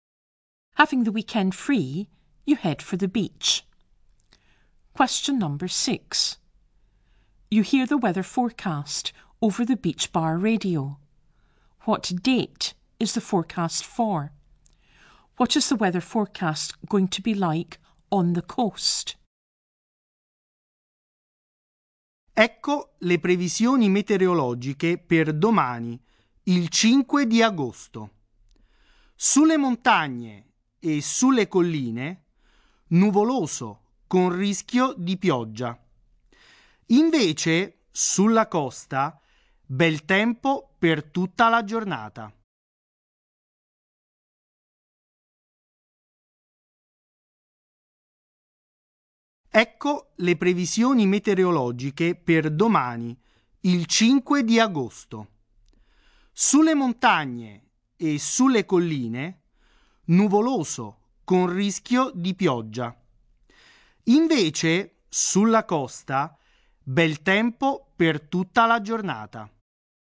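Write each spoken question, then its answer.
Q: What date is the forecast for?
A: 5 August (tomorrow)

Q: What is the weather forecast going to be like on the coast?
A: Good weather all day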